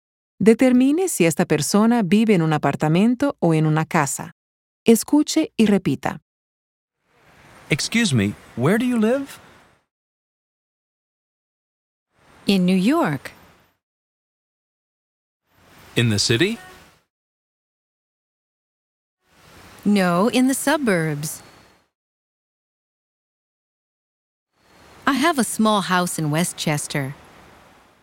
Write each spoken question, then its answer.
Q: Determine si esta persona vive en un apartamento o en una casa.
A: Esta señora vive en una casa de las afueras de la ciudad de Nueva York.